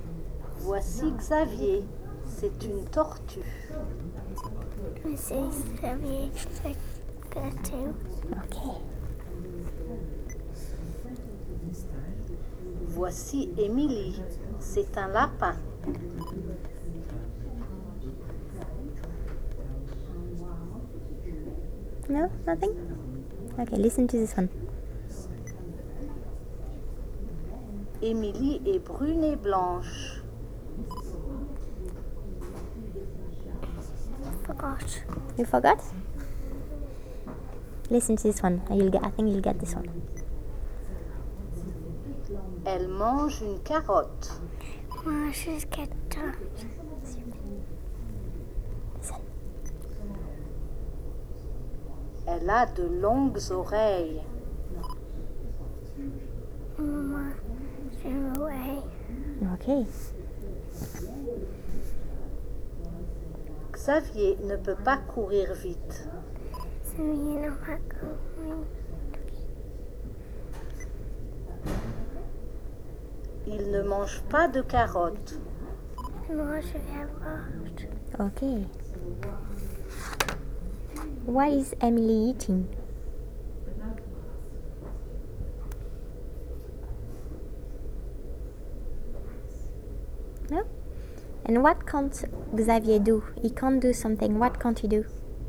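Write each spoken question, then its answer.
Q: Why is Emily eating?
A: A carrot

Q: And what can't Xavier do?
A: Run fast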